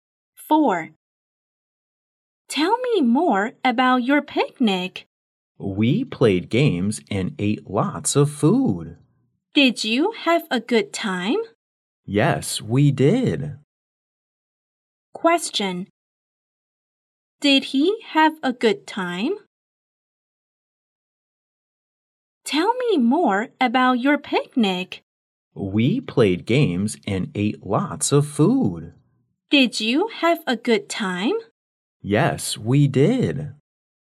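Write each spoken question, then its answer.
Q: Did he have a good time?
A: Yes, he did.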